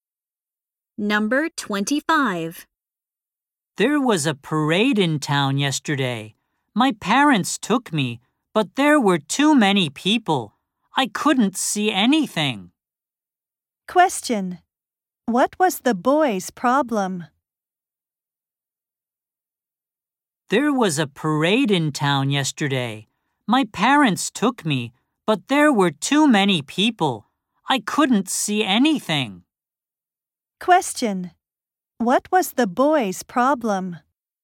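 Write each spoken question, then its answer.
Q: What was the boy's problem?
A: He couldn't see the parade because there were too many people.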